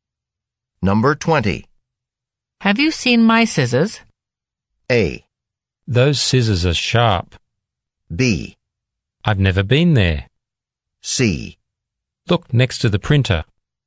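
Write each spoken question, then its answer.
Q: Have you seen my scissors?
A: C: Look next to the printer.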